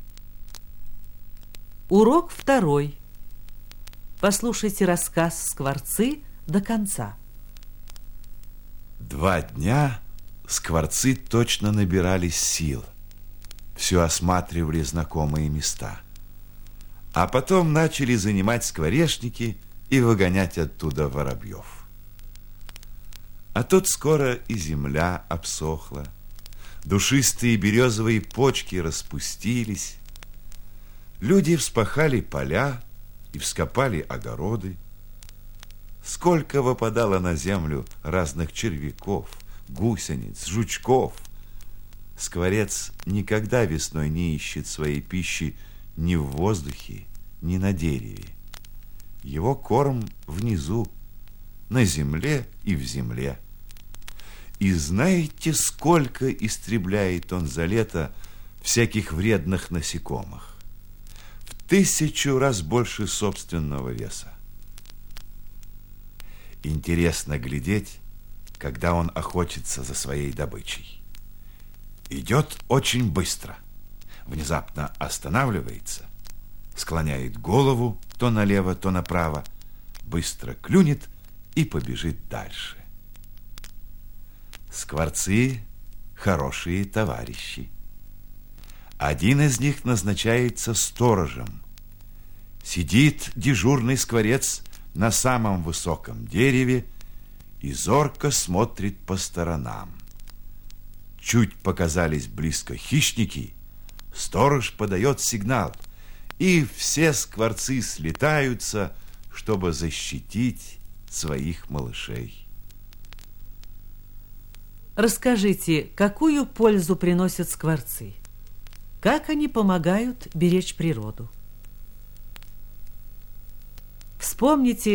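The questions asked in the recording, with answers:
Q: Расскажите, какую пользу приносят скворцы?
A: Они уничтожают вредных насекомых — за лето в 1000 раз больше собственного веса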